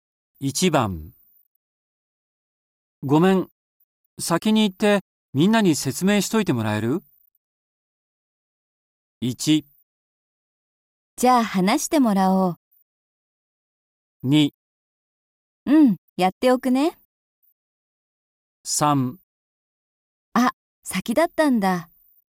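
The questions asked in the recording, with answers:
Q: ごめん、先に行ってみんなに説明しといてもらえる?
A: 2: うん、やっておくね。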